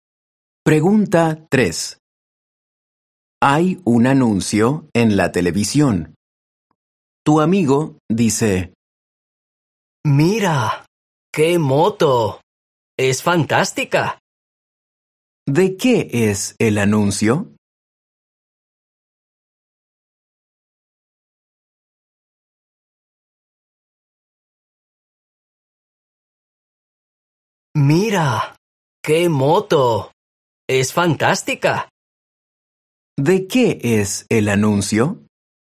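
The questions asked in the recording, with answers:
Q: ¿De qué es el anuncio?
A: De una moto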